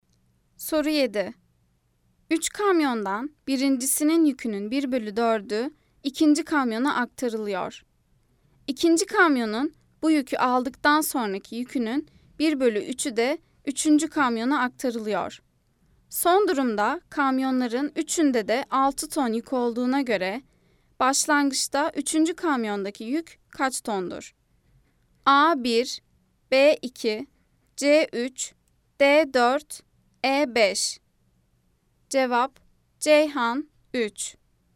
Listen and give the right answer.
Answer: Cevap: Ceyhan 3.